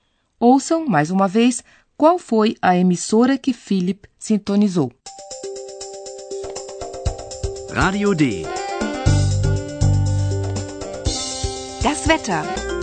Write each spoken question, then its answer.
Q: Ouçam, mais uma vez, qual foi a emissora que Philip sintonizou.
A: Era a Rádio D.